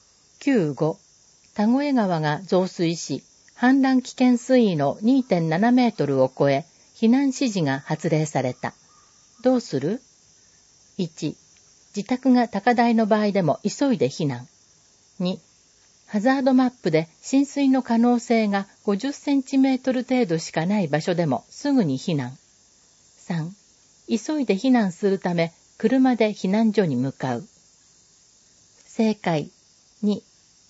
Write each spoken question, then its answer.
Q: どうする?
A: 正解。2.